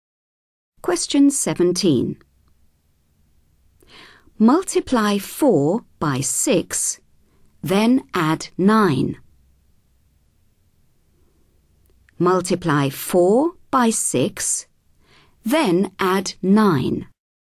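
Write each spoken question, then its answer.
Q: Multiply 4 by 6, then add 9.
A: 33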